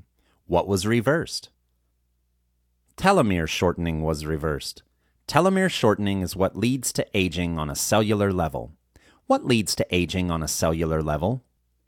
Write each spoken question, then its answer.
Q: What leads to aging on a cellular level?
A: Telomere shortening leads to aging on a cellular level.